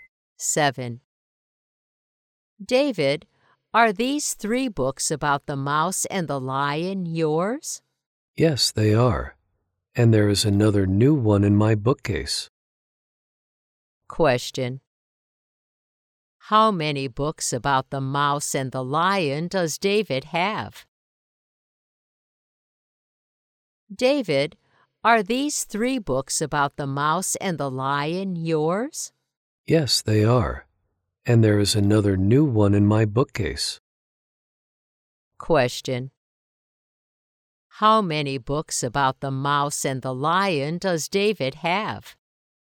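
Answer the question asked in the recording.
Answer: Four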